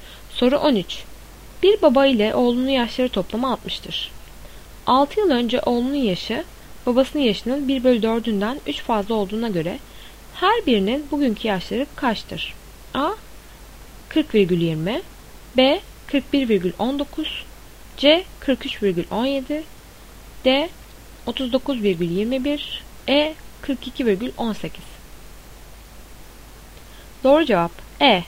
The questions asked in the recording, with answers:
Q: 6 yıl önce oğlunun yaşı, babasının yaşının 1/4'ünden 3 fazla olduğuna göre her birinin bugünkü yaşları kaçtır?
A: Doğru cevap E.